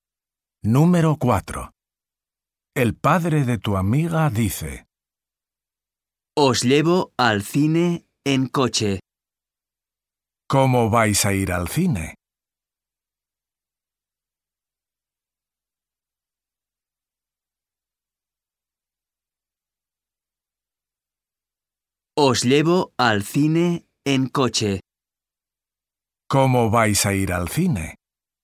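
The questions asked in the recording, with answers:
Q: ¿Cómo vais a ir al cine?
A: en coche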